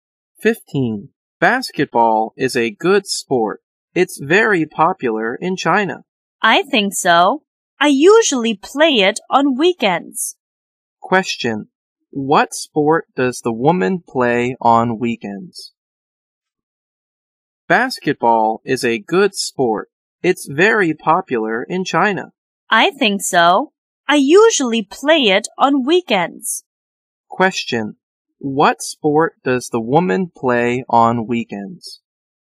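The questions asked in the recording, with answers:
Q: What sport does the woman play on weekends?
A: Basketball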